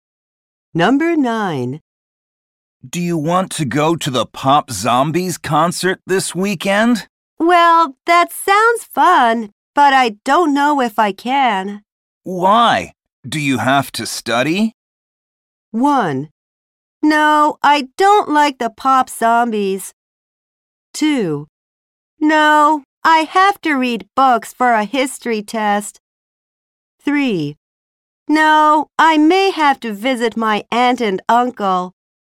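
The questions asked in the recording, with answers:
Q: Why? Do you have to study?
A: 3: No, I may have to visit my aunt and uncle.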